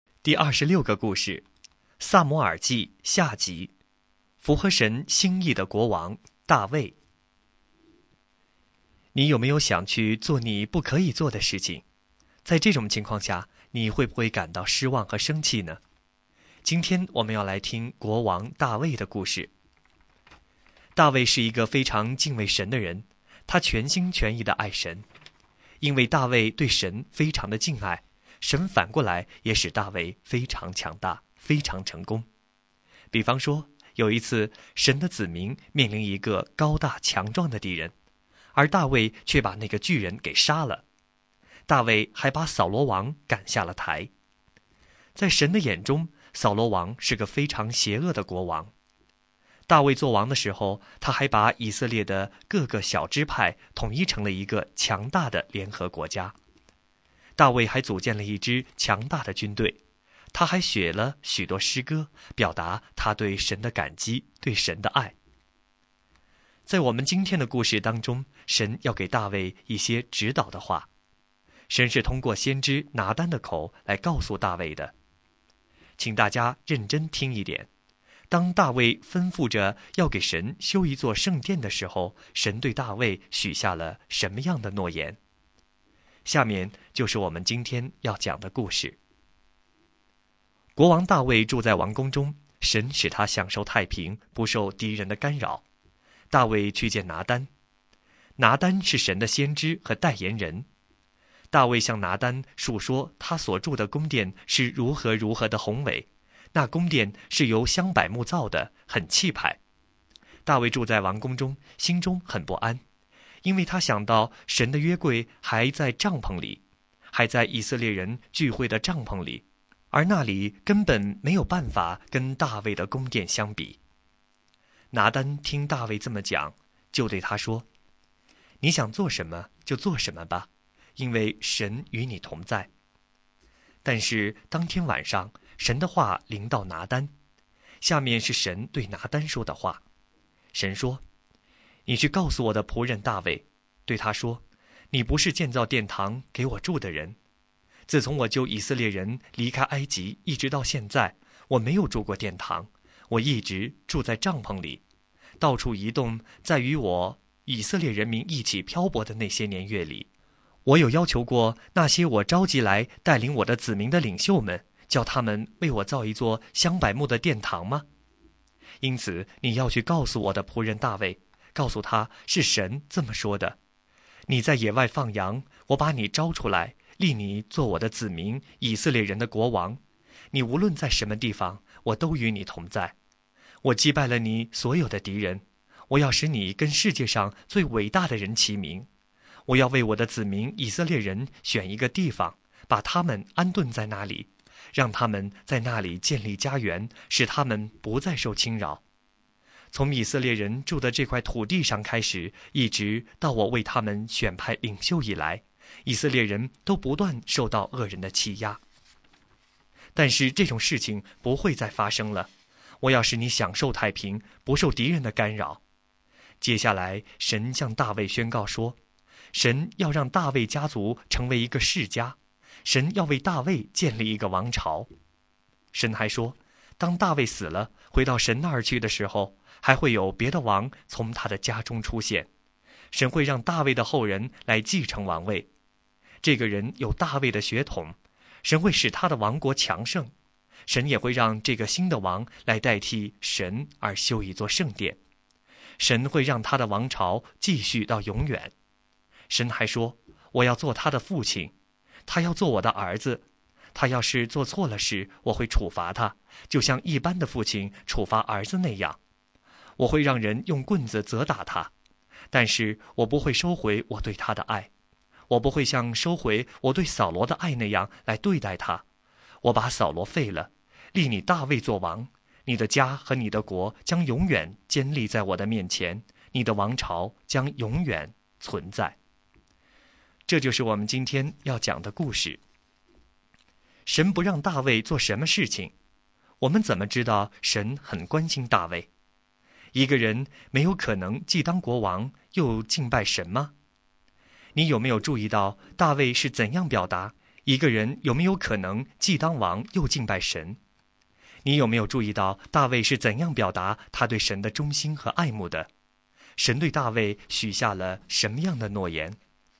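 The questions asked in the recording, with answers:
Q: 神对大卫许下了什么样的诺言?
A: 神要为大卫建立永远的王朝,让他的后人继承王位并修建圣殿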